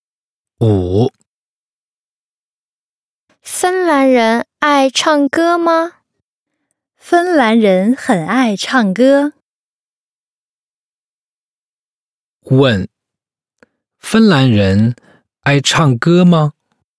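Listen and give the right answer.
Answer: 很爱唱歌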